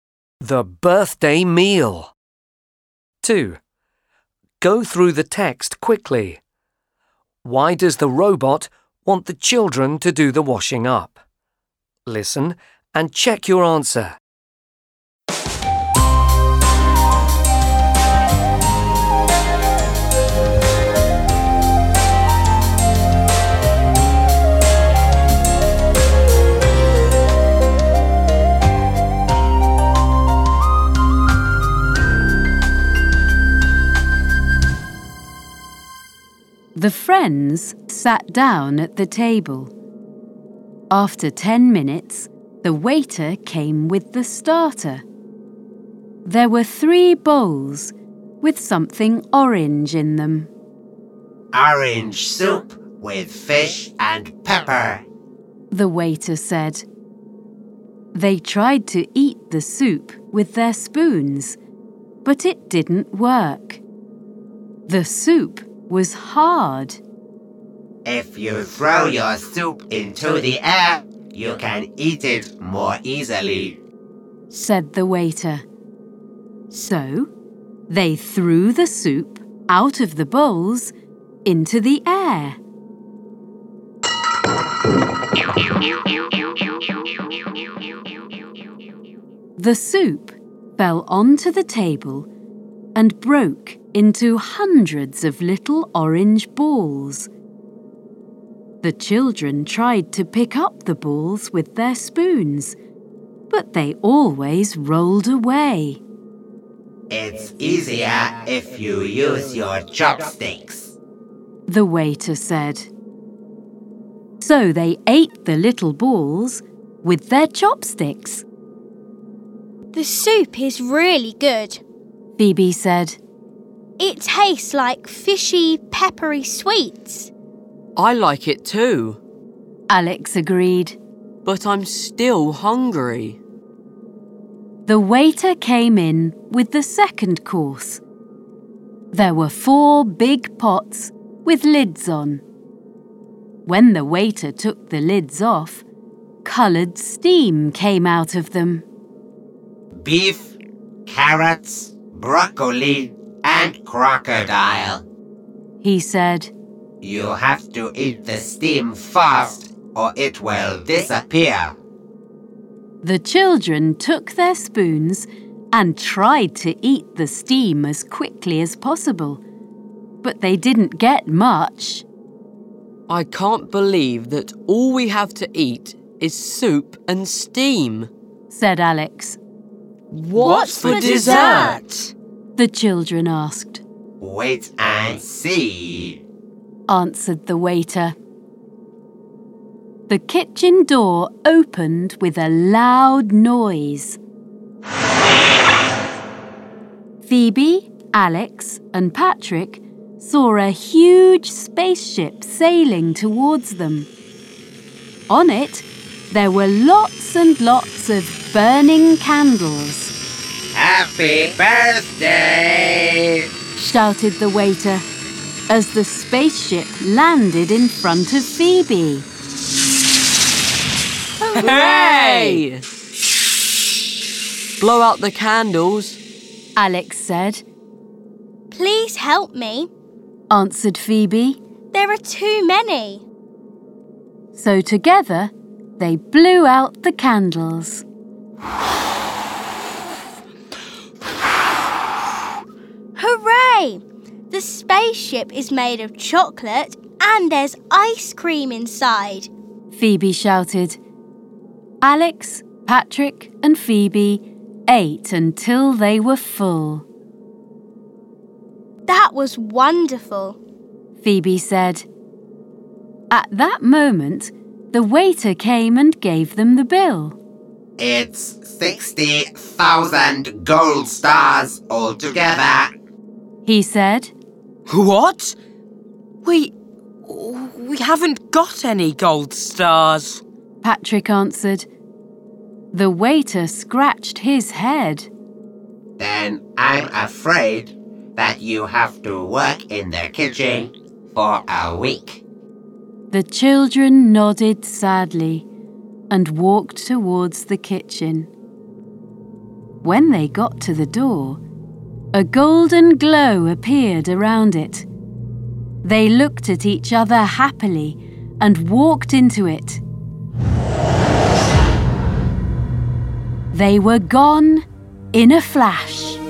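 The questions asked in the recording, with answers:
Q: Why does the robot want the children to do the washing up?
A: Because they can't pay the bill of 60,000 gold stars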